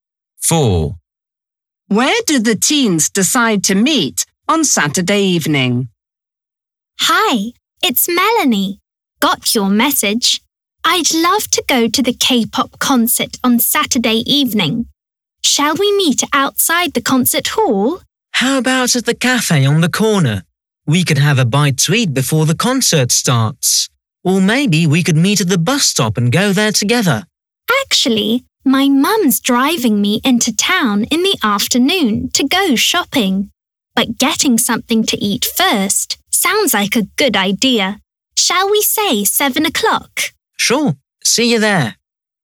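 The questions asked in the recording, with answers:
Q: Where do the teens decide to meet on Saturday evening?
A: At the cafe on the corner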